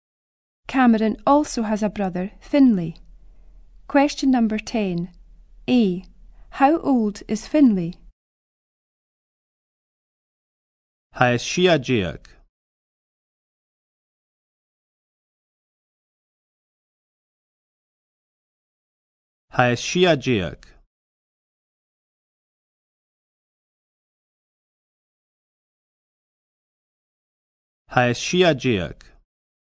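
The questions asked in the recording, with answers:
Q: How old is Finlay?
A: Sixteen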